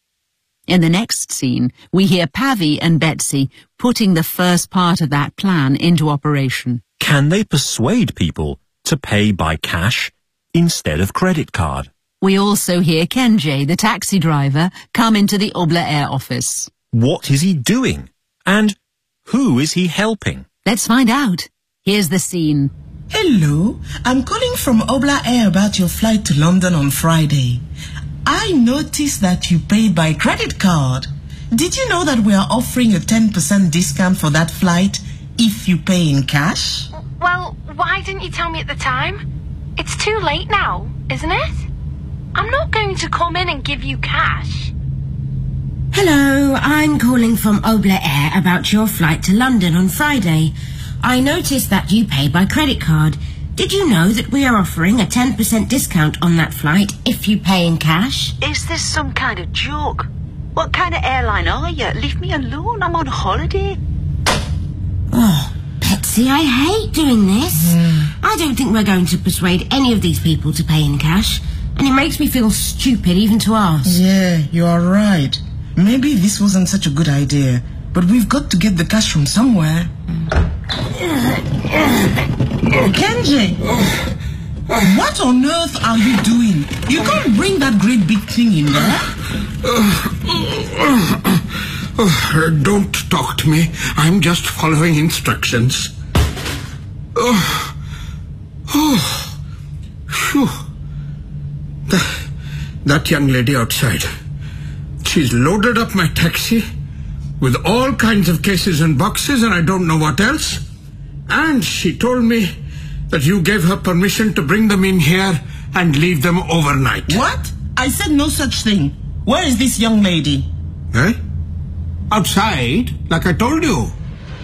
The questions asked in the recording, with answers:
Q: Can they persuade people to pay by cash instead of credit card?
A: No, I'm afraid not.

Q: And who is he helping?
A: He then explains that he's helping a young lady who's outside with lots of cases and boxes.